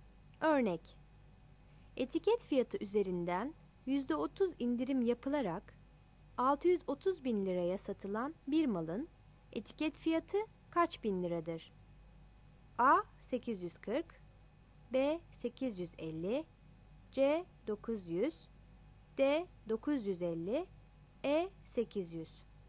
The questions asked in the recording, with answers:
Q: Etiket fiyatı üzerinden %30 indirim yapılarak 630 bin liraya satılan bir malın etiket fiyatı kaç bin liradır?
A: Yanıt C'dir.